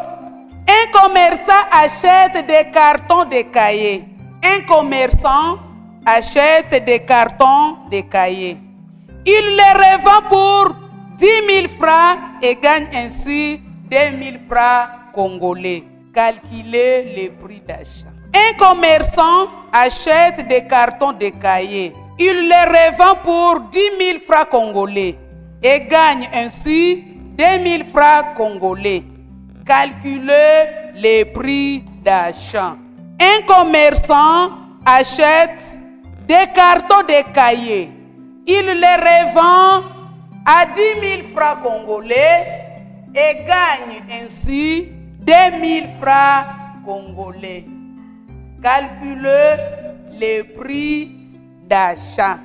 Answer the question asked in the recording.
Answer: 8000 francs congolais.